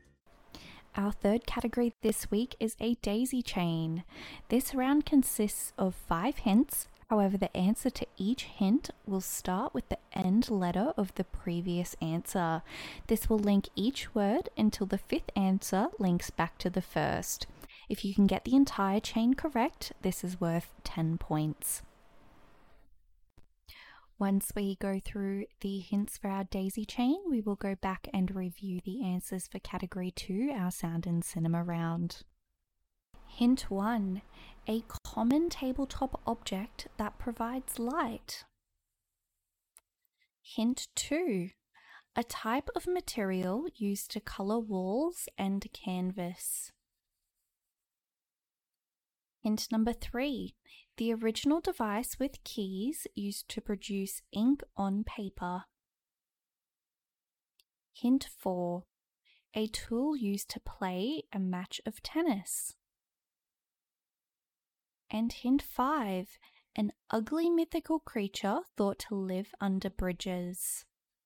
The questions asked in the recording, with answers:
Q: And hint 5, an ugly mythical creature thought to live under bridges.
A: That is a troll.